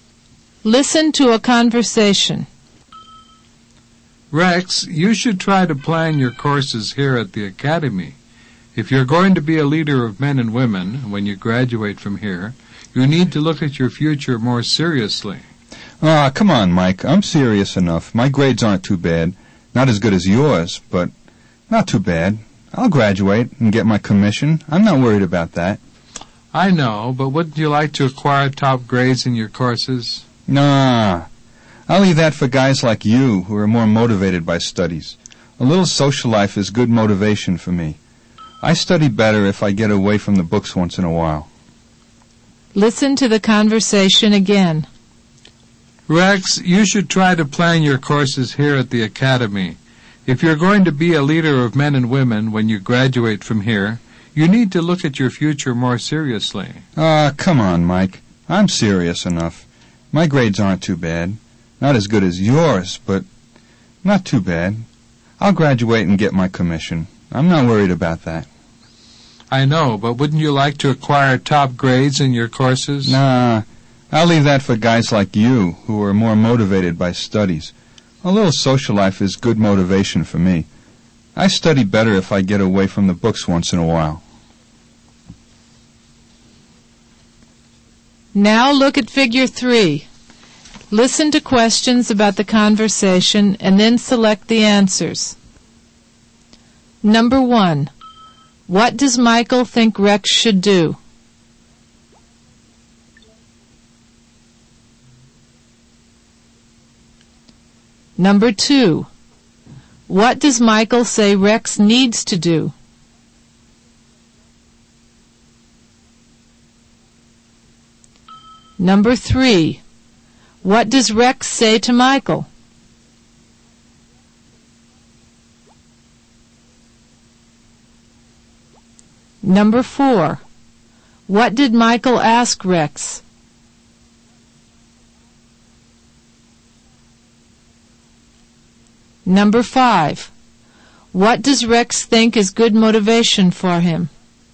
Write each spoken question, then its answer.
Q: What does Michael think Rex should do?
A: Michael thinks Rex should plan his courses.

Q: What does Michael say Rex needs to do?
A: Michael says Rex needs to think about his future more seriously.

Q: What does Rex say to Michael?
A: Rex says he's serious enough.

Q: What did Michael ask Rex?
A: Wouldn't you like to acquire top grades in your courses?

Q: What does Rex think is good motivation for him?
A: Rex thinks a little social life is good motivation for him.